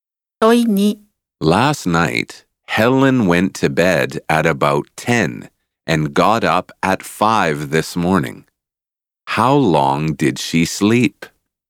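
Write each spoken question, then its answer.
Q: How long did she sleep?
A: About 7 hours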